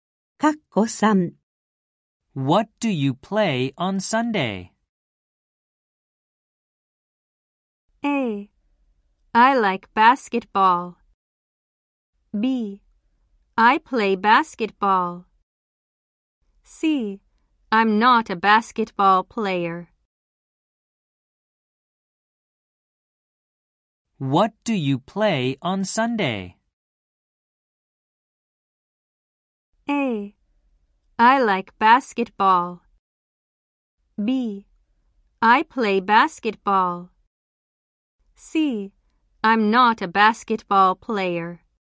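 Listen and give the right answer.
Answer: B: I play basketball.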